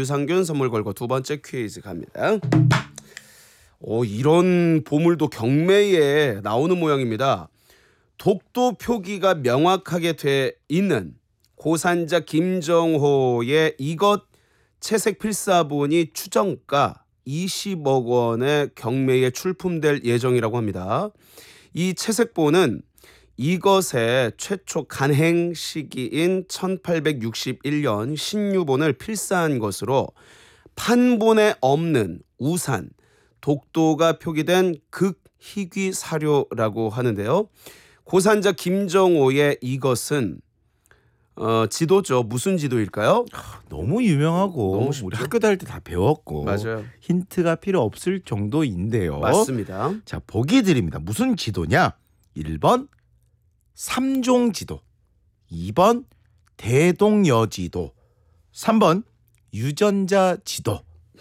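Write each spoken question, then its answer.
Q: 고산자 김정호의 이것은 지도죠. 무슨 지도일까요?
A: 2: 대동여 지도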